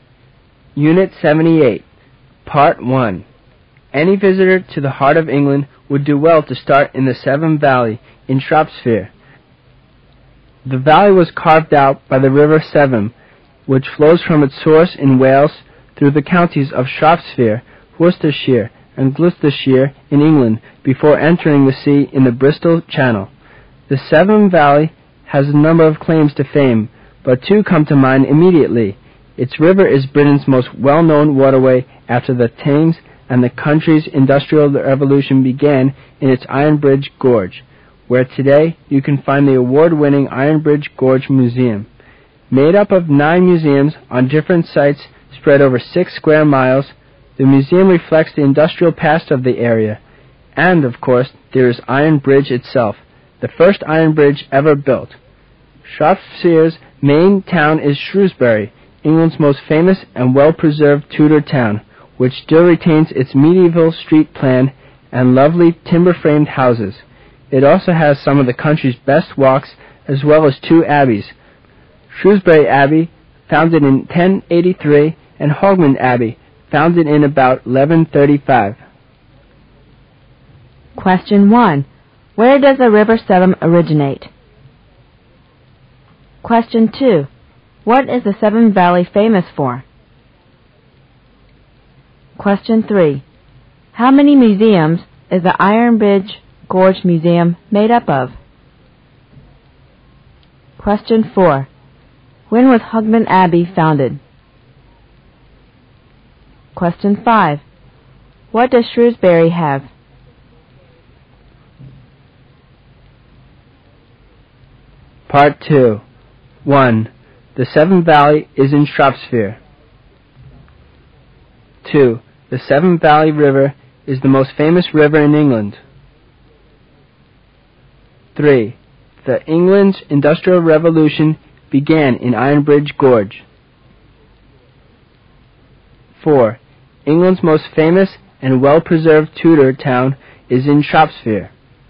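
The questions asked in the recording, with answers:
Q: Where does the River Severn originate?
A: Wales

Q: What is the Severn Valley famous for?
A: Its well-known river and the start of the industrial revolution in Iron Bridge Gorge

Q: How many museums is the Iron Bridge Gorge Museum made up of?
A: Nine

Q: When was Hogmanay Abbey founded?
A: About 1135

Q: What does Shrewsbury have?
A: Medieval street plan, timber-framed houses, good walks and two abbeys

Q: The Severn Valley is in Shropshire.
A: True

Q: The Severn Valley River is the most famous river in England.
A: False

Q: The England's Industrial Revolution began in Iron Bridge Gorge.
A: True

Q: England's most famous and well-preserved Tudor town is in Shropshire.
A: True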